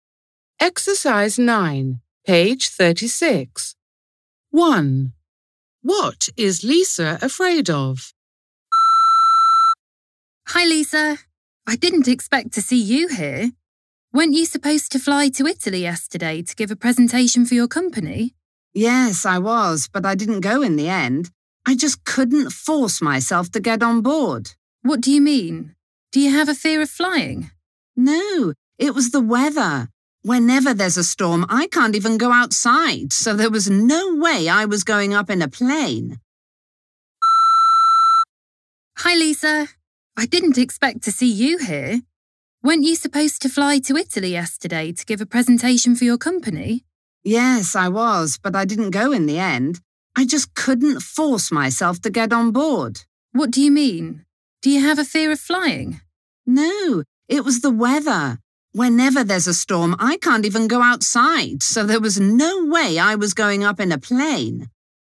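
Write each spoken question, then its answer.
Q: What is Lisa afraid of?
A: storms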